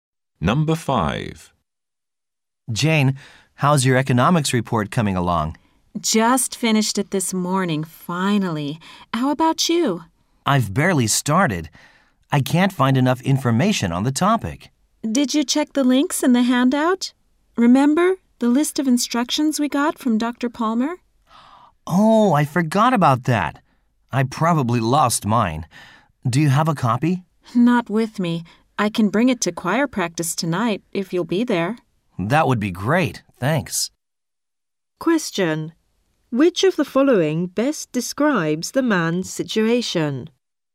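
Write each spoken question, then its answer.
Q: Which of the following best describes the man's situation?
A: He has barely started his report and lost the instruction handout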